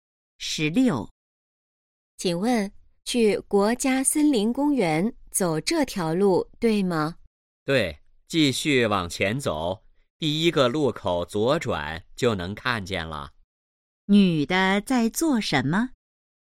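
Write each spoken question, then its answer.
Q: 女的在做什么?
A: 问路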